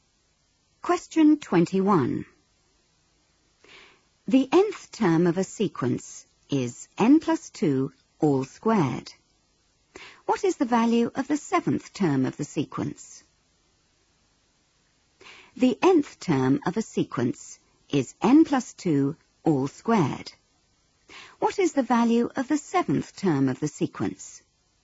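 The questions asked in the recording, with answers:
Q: What is the value of the seventh term of the sequence?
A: 81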